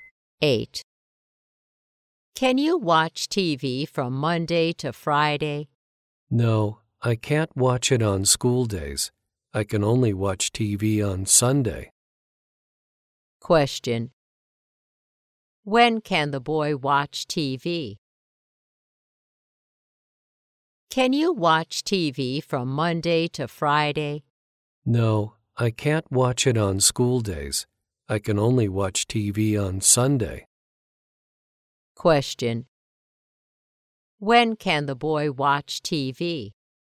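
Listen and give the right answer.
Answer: On Sunday.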